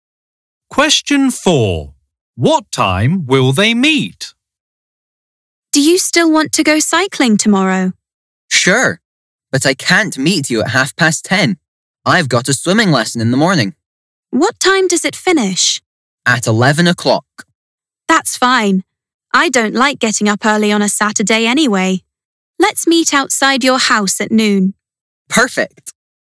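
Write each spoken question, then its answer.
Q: What time will they meet?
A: At noon.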